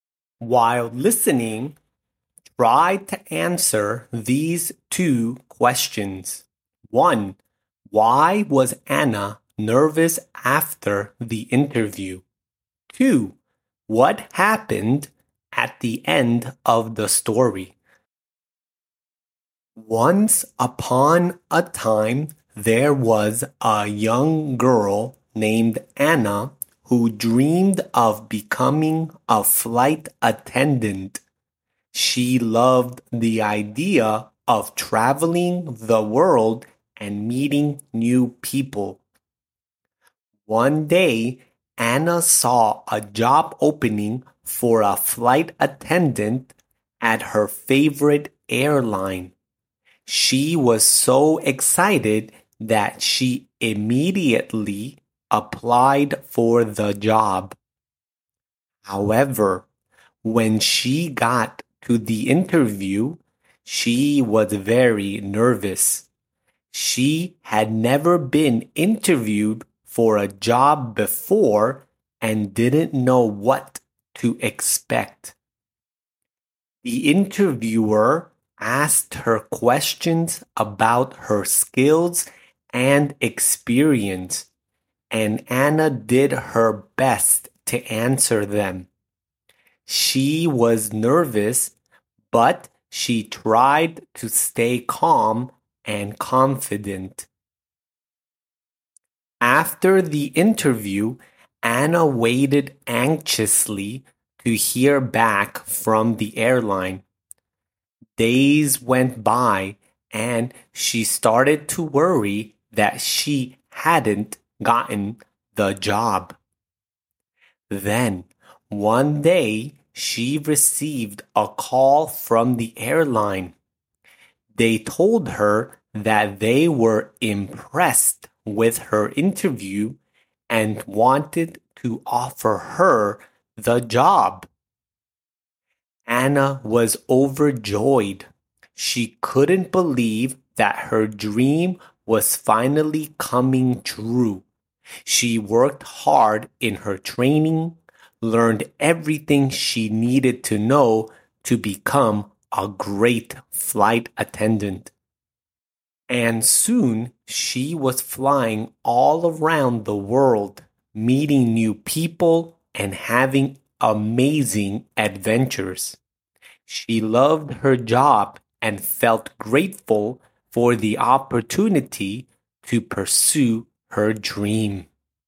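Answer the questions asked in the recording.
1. She was worried she hadn't gotten the job
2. Anna got the job and became a flight attendant, flying around the world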